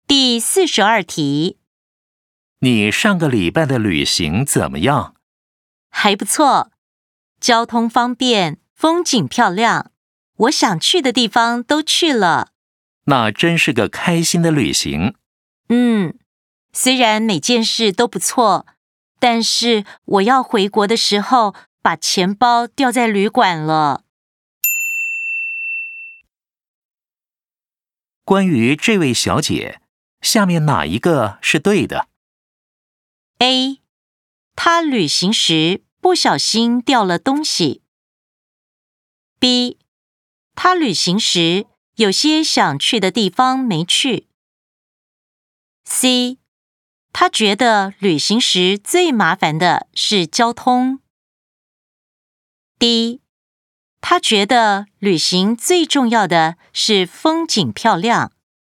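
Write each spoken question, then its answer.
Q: 关于这位小姐,下面哪一个是对的?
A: A: 她旅行时不小心掉了东西。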